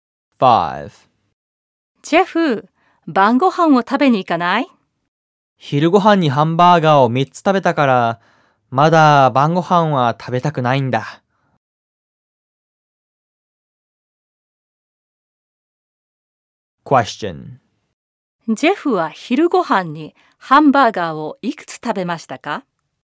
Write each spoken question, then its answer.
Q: ジェフは昼ごはんにハンバーガーをいくつ食べましたか?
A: ジェフは昼ごはんにハンバーガーを3つも食べました。